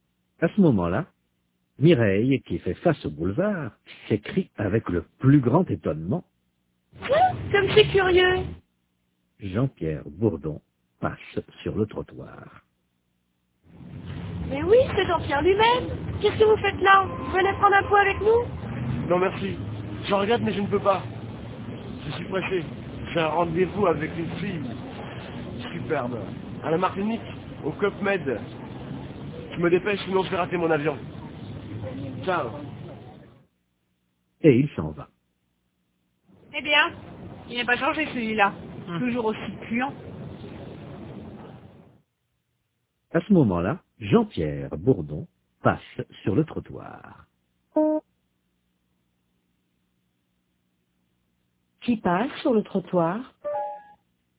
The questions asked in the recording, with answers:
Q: Qui passe sur le trottoir?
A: Jean-Pierre Bourdon.